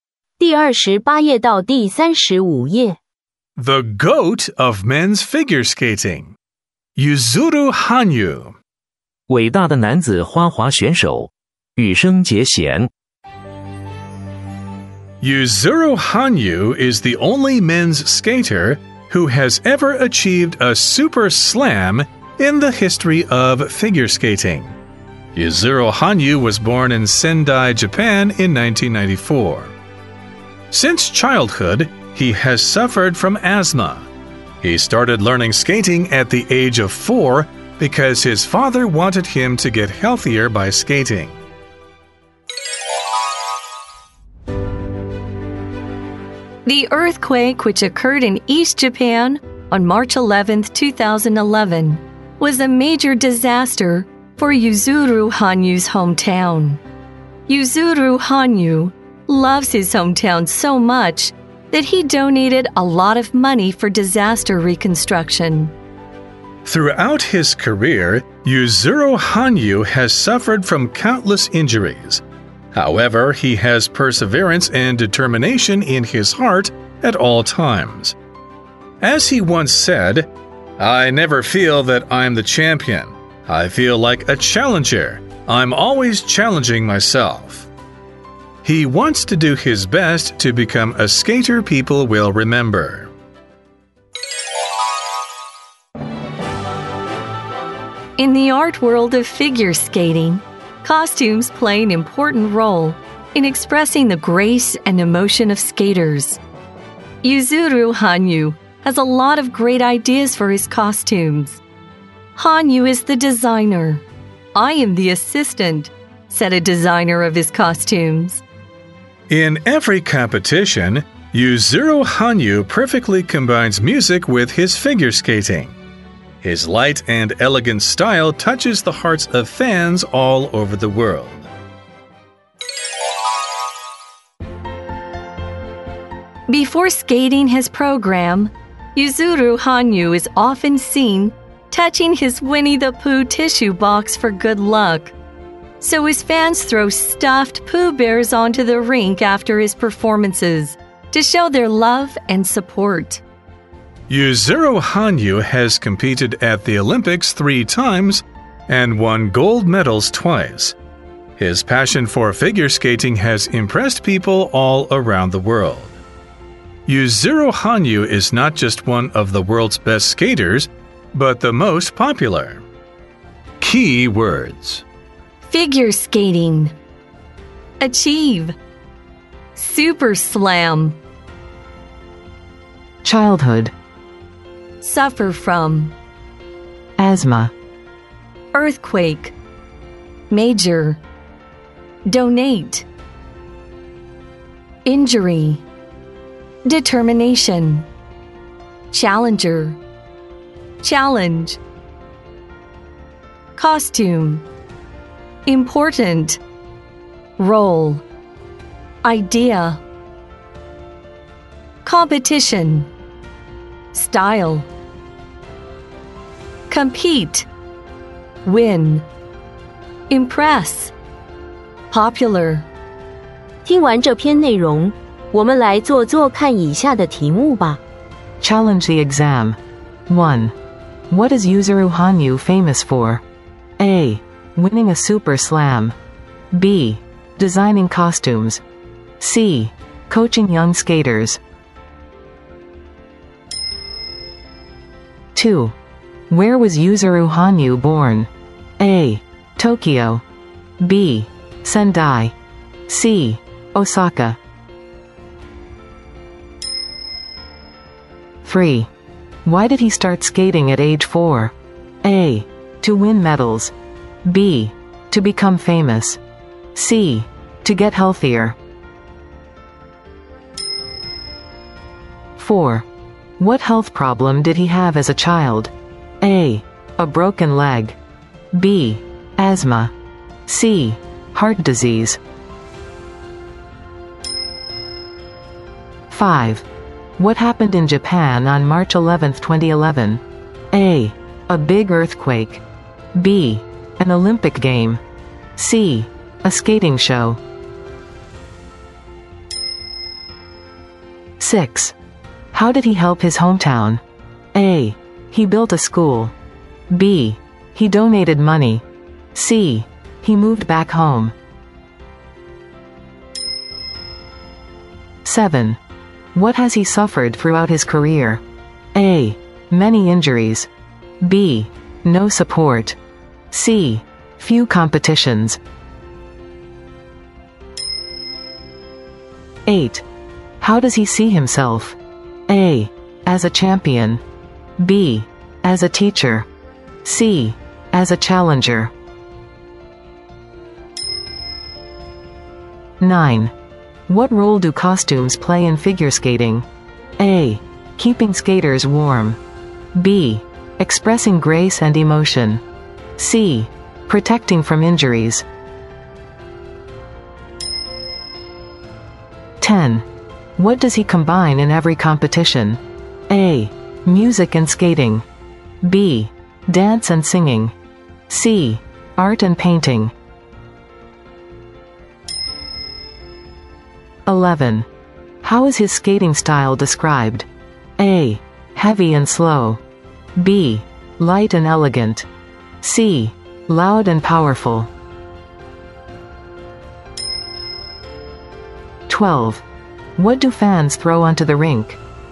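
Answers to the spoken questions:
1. A: Winning a super slam.
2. B: Sendai.
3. C: To get healthier.
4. B: Asthma.
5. A: A big earthquake.
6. B: He donated money.
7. A: Many injuries.
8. C: As a challenger.
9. B: Expressing grace and emotion.
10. A: Music and skating.
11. B: Light and elegant.
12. C: Stuffed Pooh bears.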